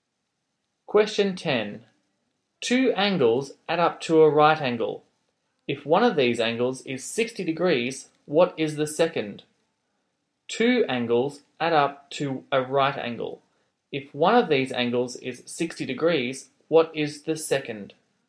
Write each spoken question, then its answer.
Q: If one of these angles is 60 degrees, what is the second?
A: the angle you're looking for is 30 degrees.